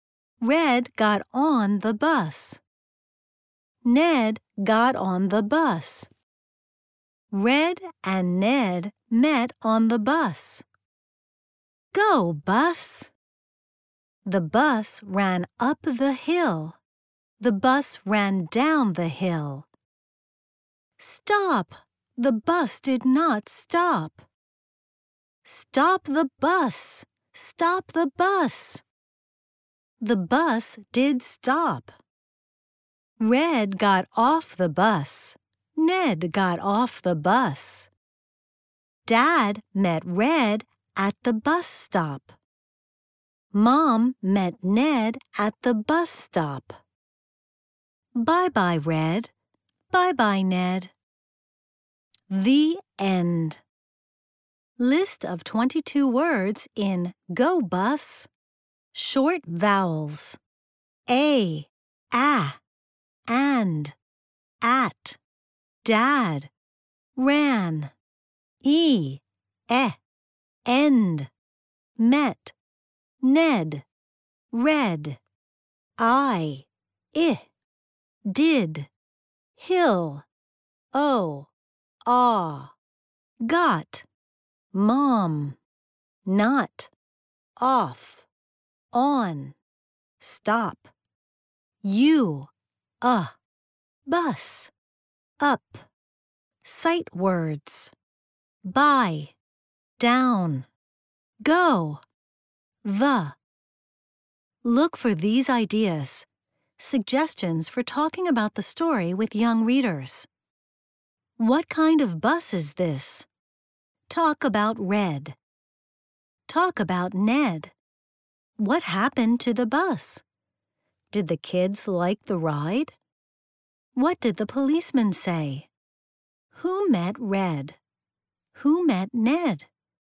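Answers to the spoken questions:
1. Dad
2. Mom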